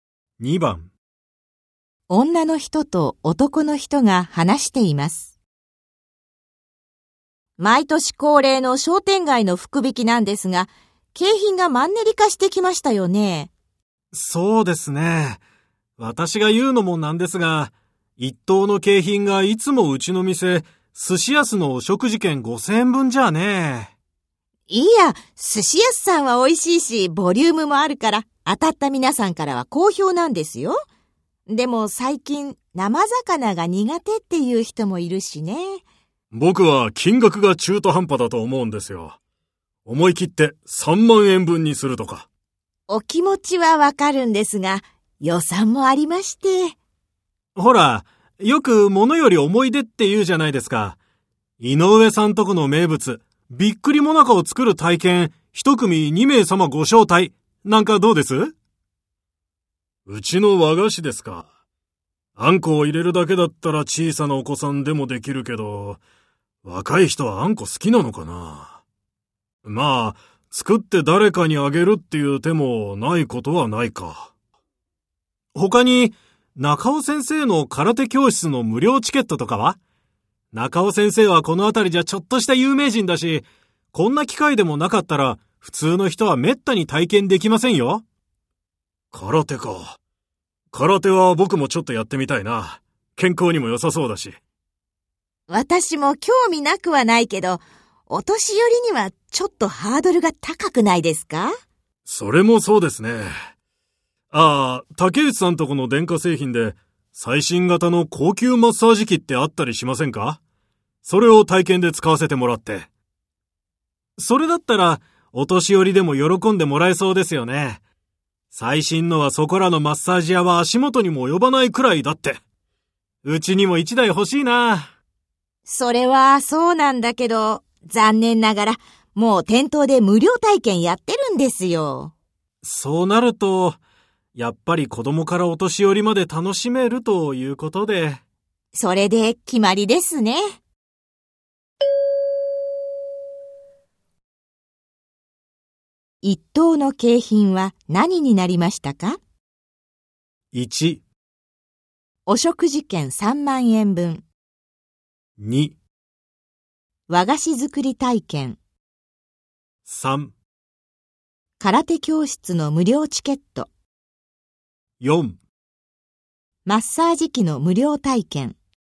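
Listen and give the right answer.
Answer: 2: 和菓子作り体験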